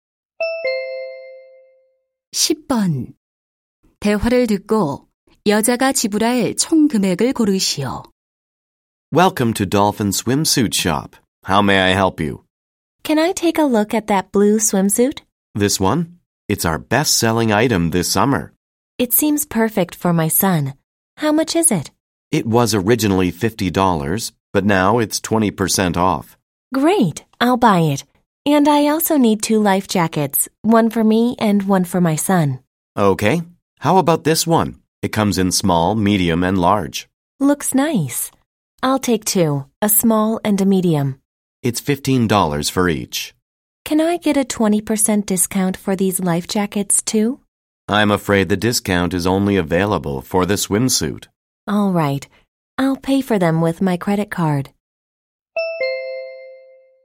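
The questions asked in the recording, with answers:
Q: 대화를 듣고 여자가 지불할 총 금액을 고르시오.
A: $70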